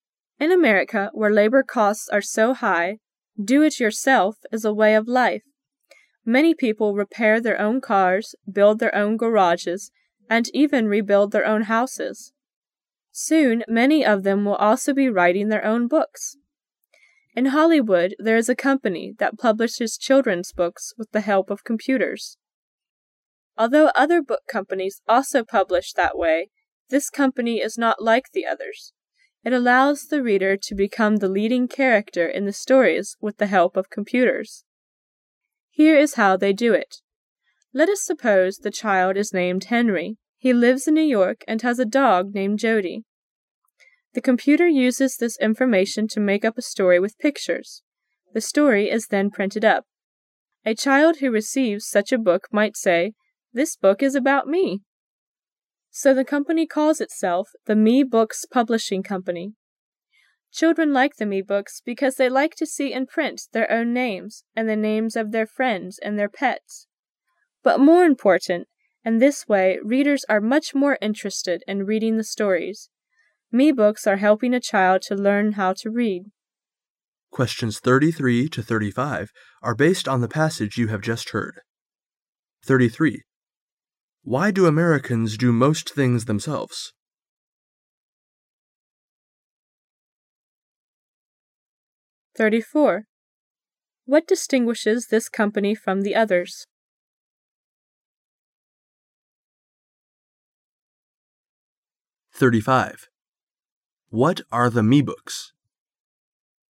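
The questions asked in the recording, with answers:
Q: Why do Americans do most things themselves?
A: Because labor costs are so high.

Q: What distinguishes this company from the others?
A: It lets the reader become the leading character in the stories.

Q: What are the Me Books?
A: Computer-made children's books in which the reader is the main character.

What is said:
[解析] 33-35 In America, where labor costs are so high, "do it yourself " is a way of life. Many people repair their own cars, build their own garages, and even rebuild their own houses, Soon many of them will also be writing their own books. In Hollywood there is a company that publishes children's book with the help of computers. Although other book companies also publish that way, this company is not like the others. It allows the reader to become the leading character in the stories with the help of computers, Here is how they do it. 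Let us suppose the child is named Henry. He lives in New York, and has a god named Jody. The computer uses this information to make up a story with pictures.. The story' is then printed up. A child who receives such a book might say, "This book is about me." So the company calls itself the "Me-Books Publishing Company". Children like the Me-Books because they like to see in print their own names and the names of their friends and their pets. But more important, in this way, readers are much more interested in reading the stories. Me-Books are helping a child to learn how to read.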